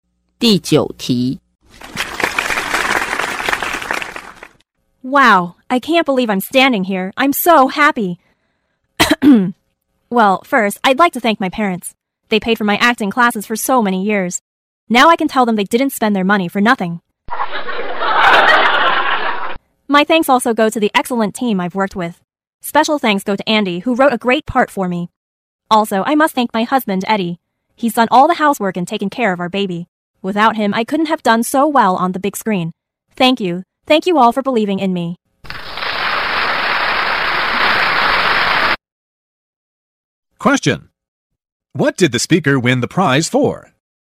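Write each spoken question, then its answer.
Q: What did the speaker win the prize for?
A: Her acting in a movie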